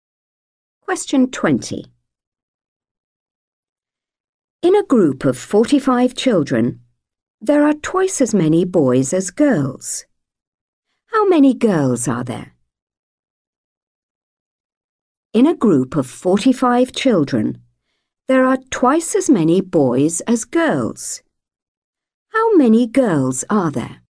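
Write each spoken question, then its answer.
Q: How many girls are there?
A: 15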